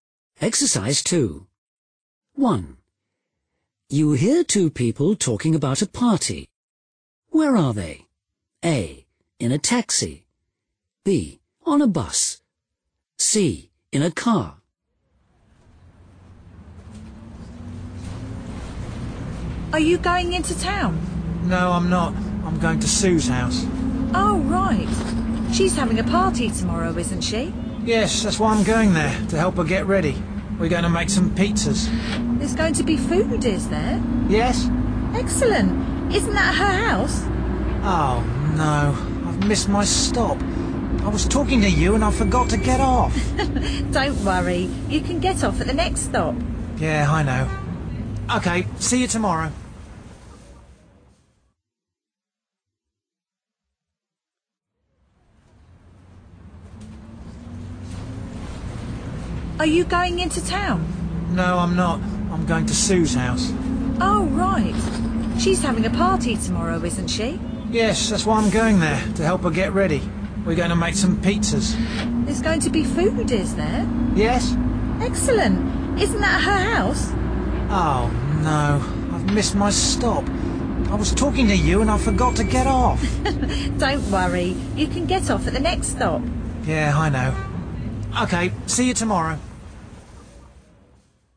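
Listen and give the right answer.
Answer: B: On a bus.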